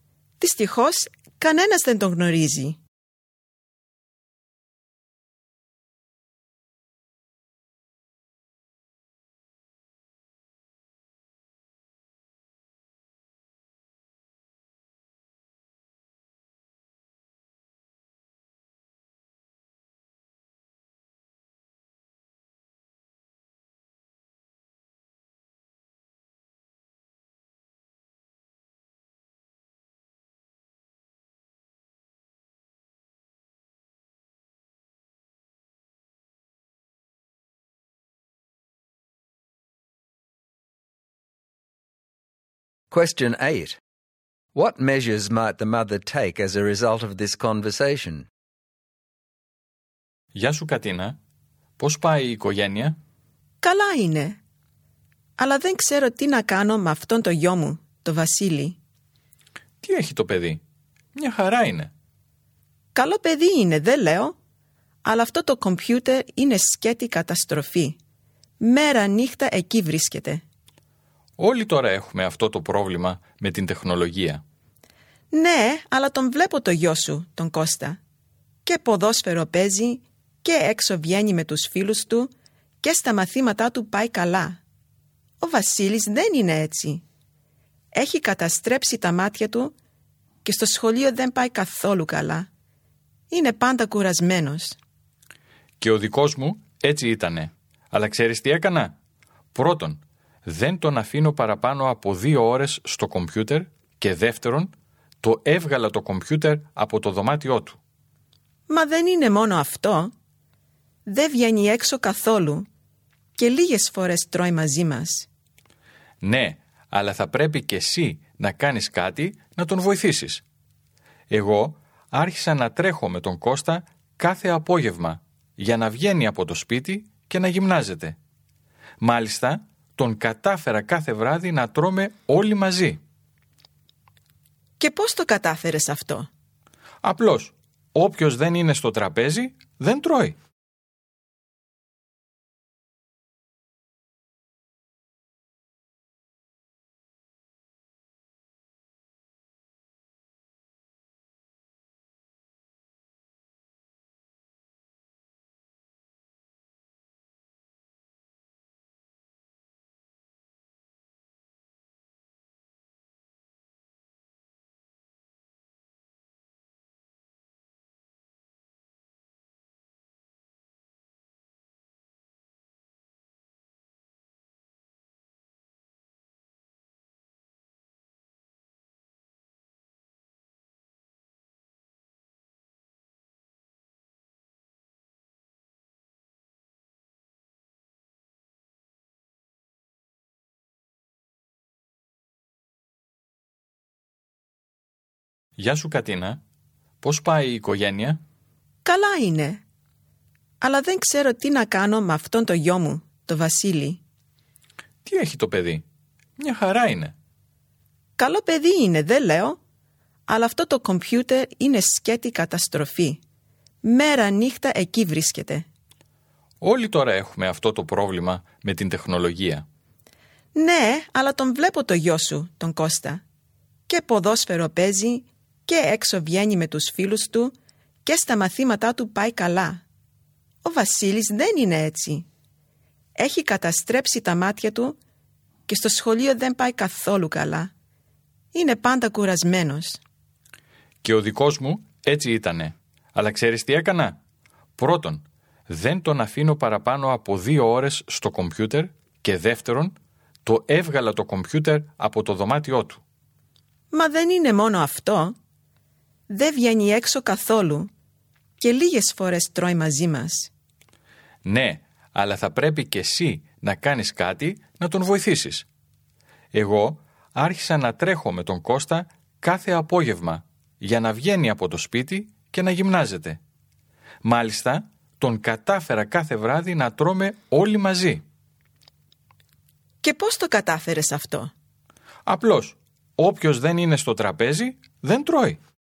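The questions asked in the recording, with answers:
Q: What measures might the mother take as a result of this conversation?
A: Limit computer use to 2 hours a day, take the computer out of his room, go running with him every afternoon, and have the family eat together (no dinner unless he is at the table)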